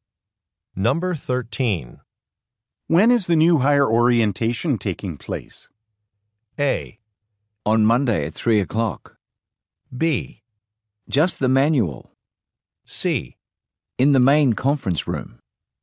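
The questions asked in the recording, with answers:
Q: When is the new hire orientation taking place?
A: A: On Monday at 3 o'clock.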